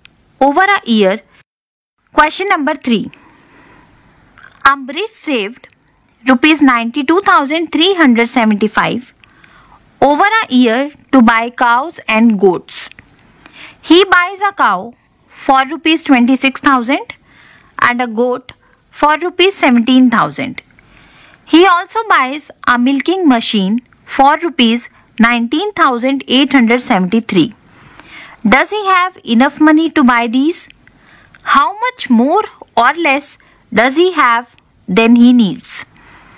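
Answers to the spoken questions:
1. Yes (needs ₹62,873)
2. ₹29,502 more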